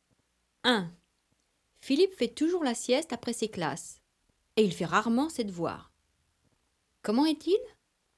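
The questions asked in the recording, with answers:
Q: Comment est-il?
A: paresseux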